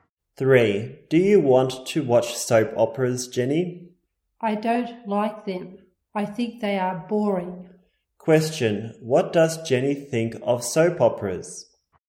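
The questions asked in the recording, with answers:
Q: What does Jenny think of soap operas?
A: Boring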